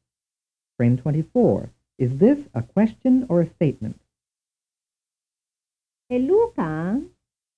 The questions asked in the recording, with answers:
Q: Is this a question or a statement?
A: The answer is a question.